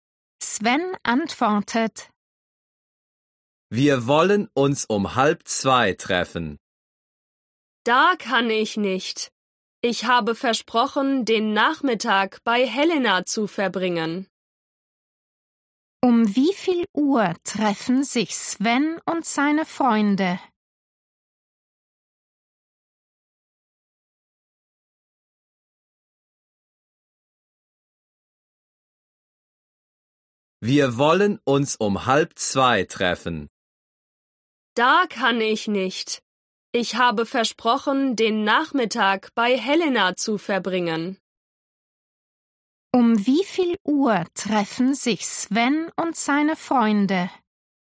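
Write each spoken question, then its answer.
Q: Um wie viel Uhr treffen sich Sven und seine Freunde?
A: um 2:30 (halb drei)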